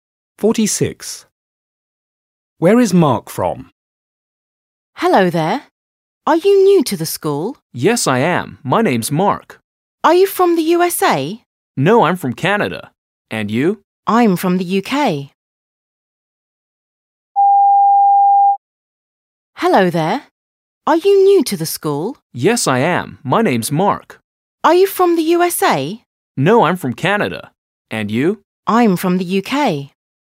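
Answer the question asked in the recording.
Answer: Canada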